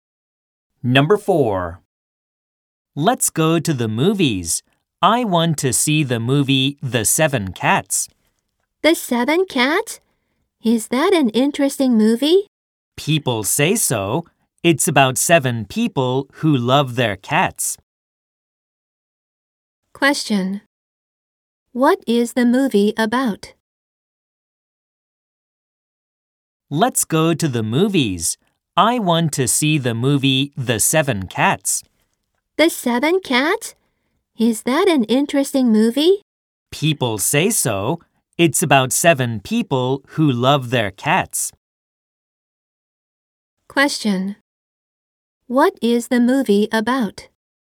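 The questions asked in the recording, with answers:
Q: What is the movie about?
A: Seven people who love their cats.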